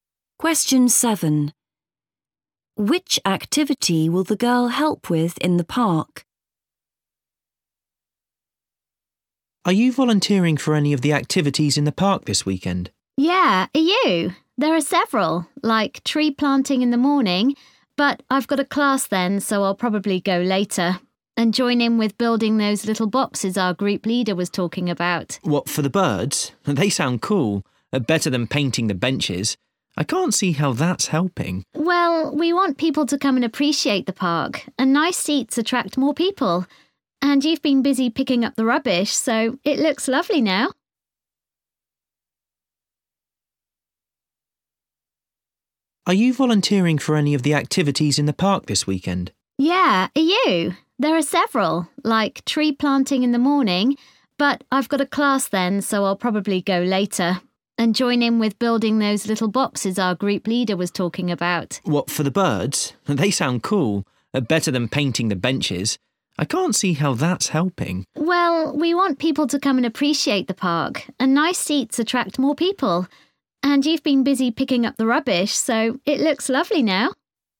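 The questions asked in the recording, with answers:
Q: Which activity will the girl help with in the park?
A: building bird boxes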